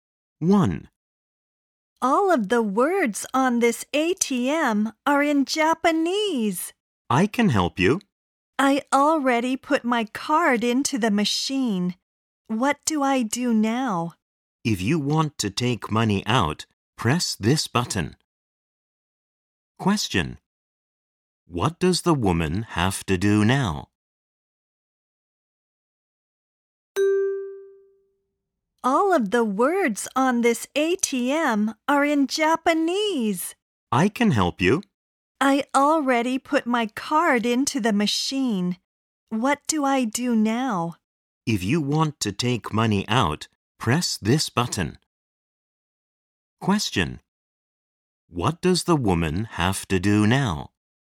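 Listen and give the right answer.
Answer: Press the button to take money out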